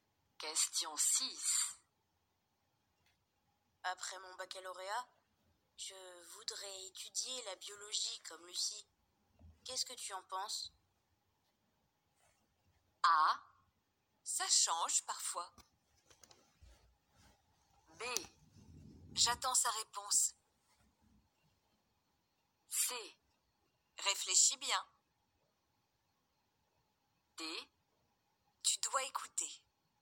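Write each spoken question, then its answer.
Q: Qu'est-ce que tu en penses?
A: C: Réfléchis bien.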